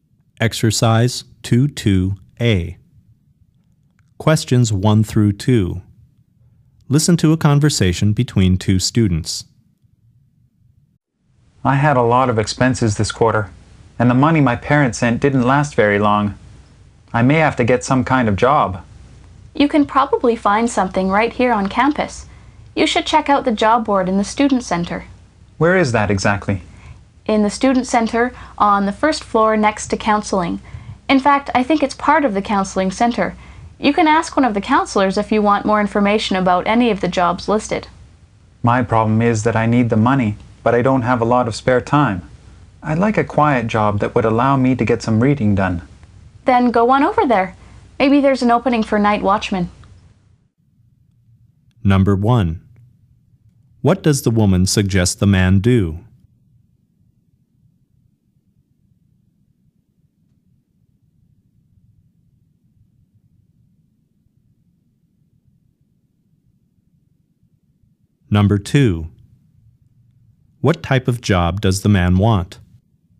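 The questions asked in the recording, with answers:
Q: What does the woman suggest the man do?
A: Check the job board in the student center

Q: What type of job does the man want?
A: A quiet job that lets him get some reading done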